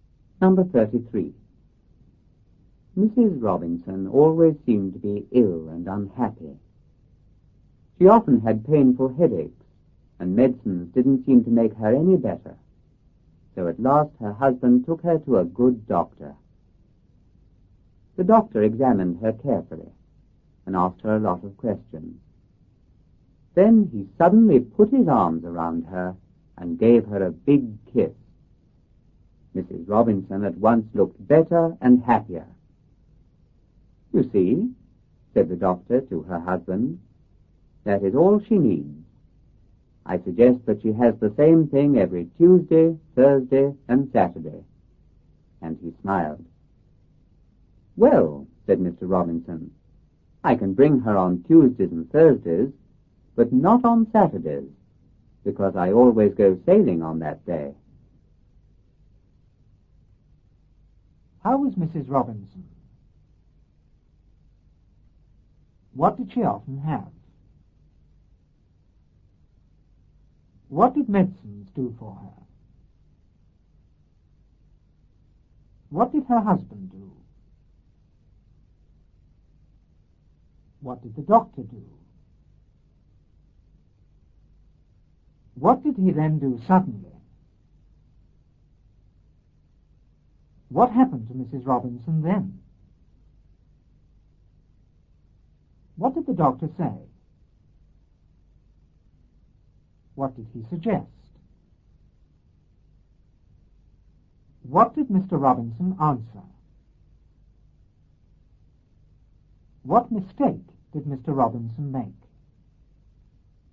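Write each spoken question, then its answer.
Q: How was Mrs. Robinson?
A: Always ill and unhappy

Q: What did she often have?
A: Painful headaches

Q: What did medicines do for her?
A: They didn't make her any better

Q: What did her husband do?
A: He took her to a good doctor

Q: What did the doctor do?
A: He examined her carefully and asked her a lot of questions

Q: What did he then do suddenly?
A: He put his arms around her and gave her a big kiss

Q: What happened to Mrs. Robinson then?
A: She at once looked better and happier

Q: What did the doctor say?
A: That is all she needs

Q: What did he suggest?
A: That she has the same thing every Tuesday, Thursday and Saturday

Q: What did Mr. Robinson answer?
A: He could bring her on Tuesdays and Thursdays, but not on Saturdays, because he always goes sailing then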